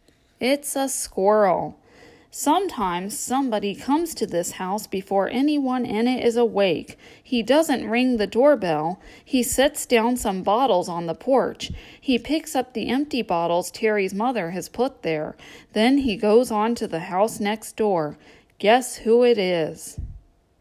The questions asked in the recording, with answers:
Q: Guess who it is?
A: It's the milkman on Terry's street.